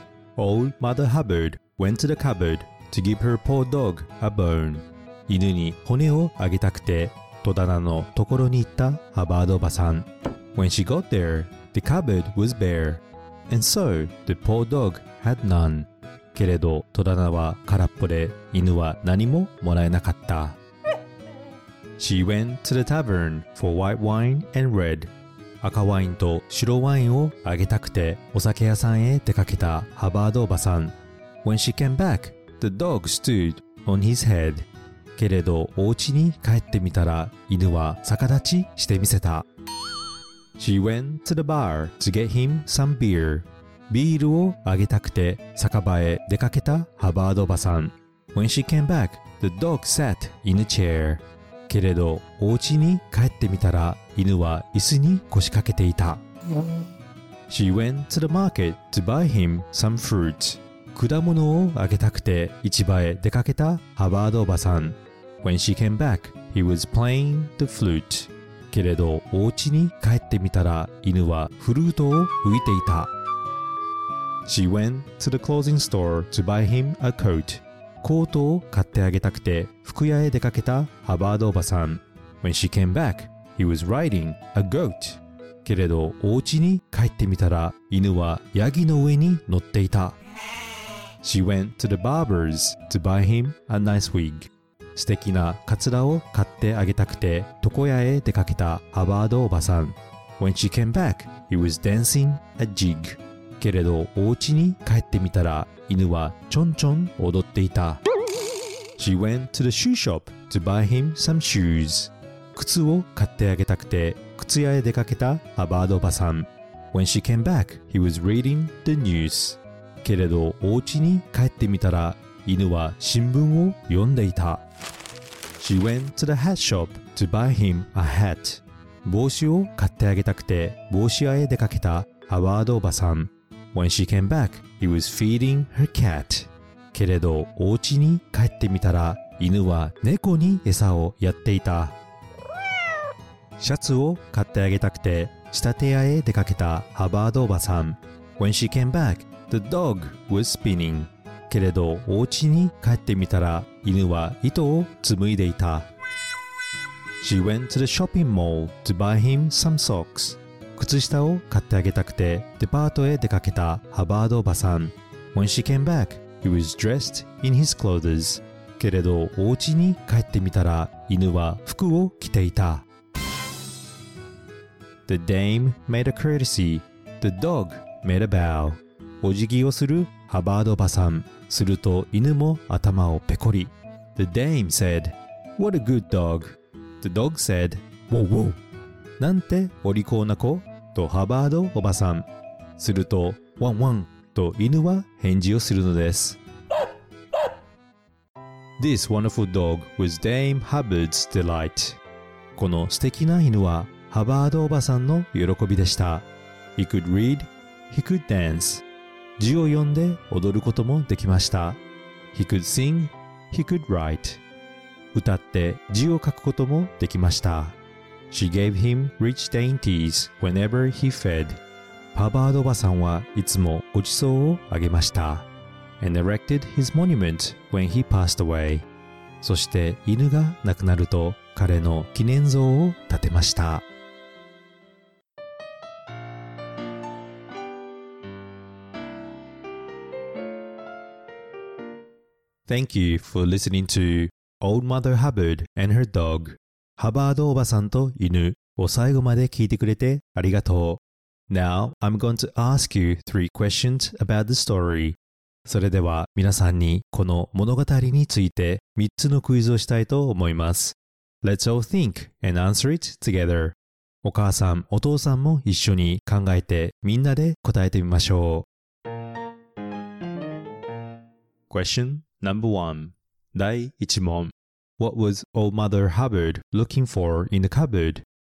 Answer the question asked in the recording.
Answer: She was looking for a bone to feed her dog.